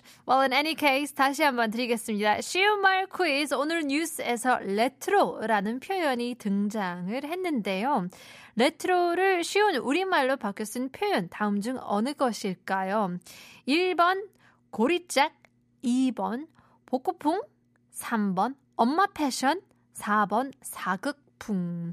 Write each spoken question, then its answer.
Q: 레트로를 쉬운 우리말로 바뀌어 쓴 표현, 다음 중 어느 것일까요?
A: 2번이라고 보내주시는데요.